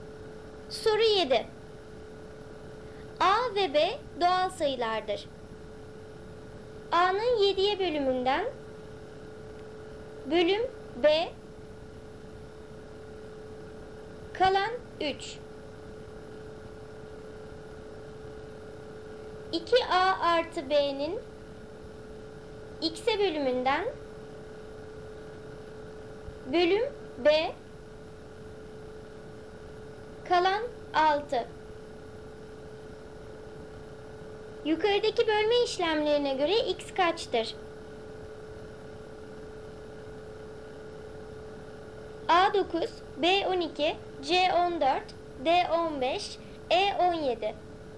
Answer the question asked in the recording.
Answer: Doğru cevap D 15.